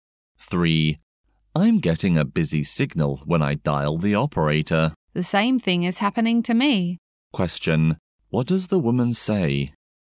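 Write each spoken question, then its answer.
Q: what does the woman say?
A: She also gets a busy signal when dialing the operator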